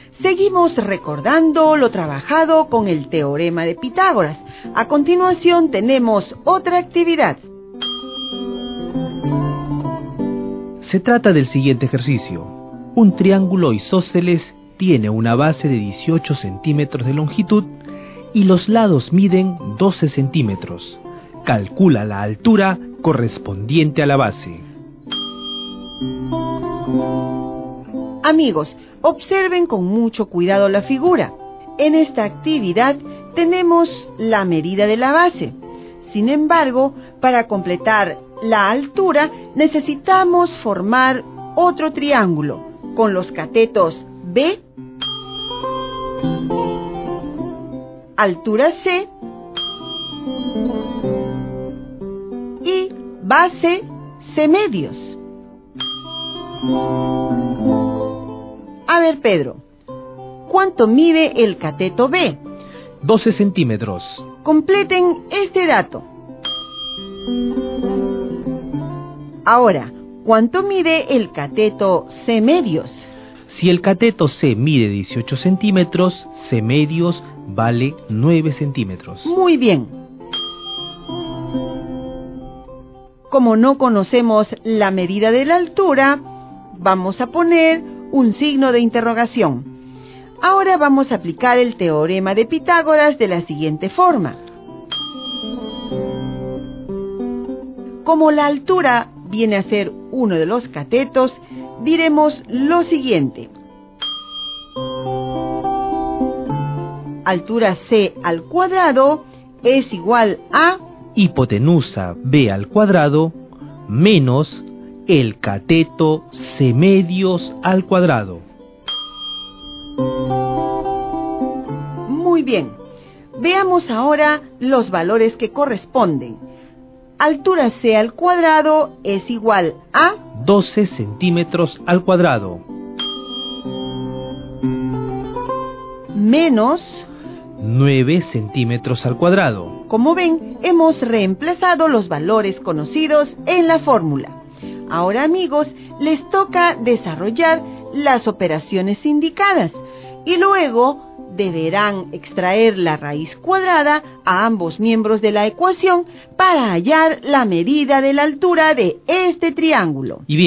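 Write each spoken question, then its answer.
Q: Calcula la altura correspondiente a la base.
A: √63 ≈ 7,94 centímetros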